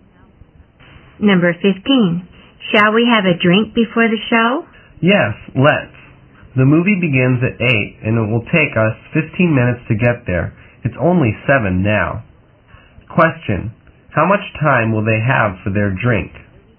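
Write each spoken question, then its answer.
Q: How much time will they have for their drink?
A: 45 minutes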